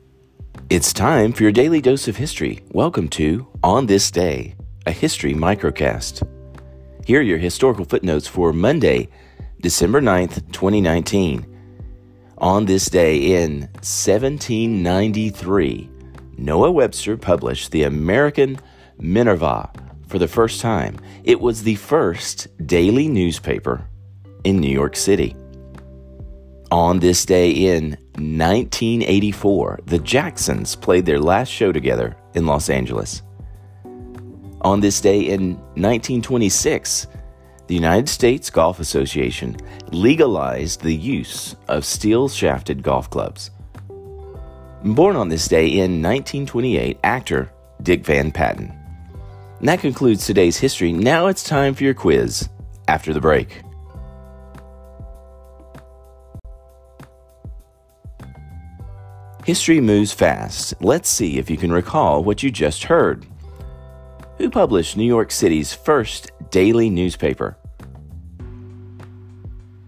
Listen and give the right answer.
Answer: Answer, Noah Webster.